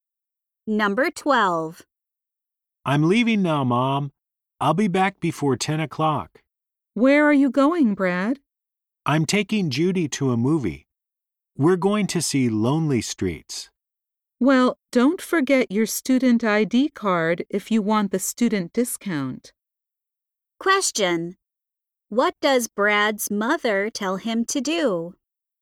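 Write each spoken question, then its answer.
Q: What does Brad's mother tell him to do?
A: Take his student ID card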